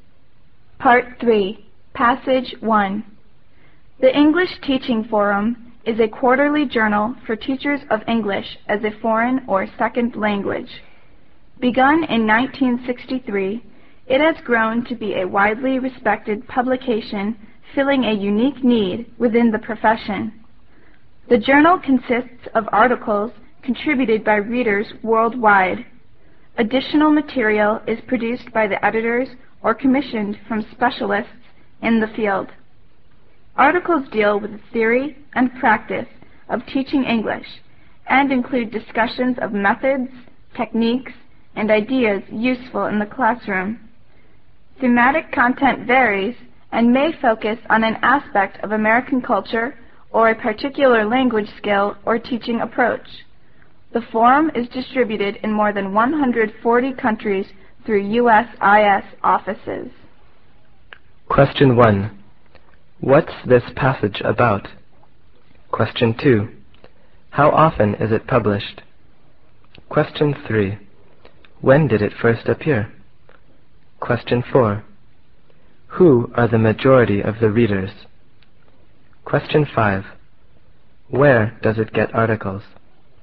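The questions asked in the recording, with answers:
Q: What's this passage about?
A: The English Teaching Forum journal

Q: How often is it published?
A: Quarterly

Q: When did it first appear?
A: In 1963

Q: Who are the majority of the readers?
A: Teachers of English as a foreign or second language

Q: Where does it get articles?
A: From readers worldwide, plus editors and commissioned specialists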